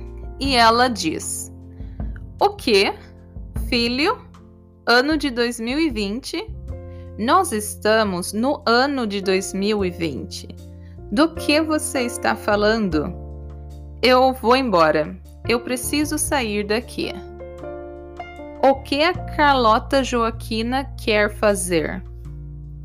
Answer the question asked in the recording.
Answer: Sair.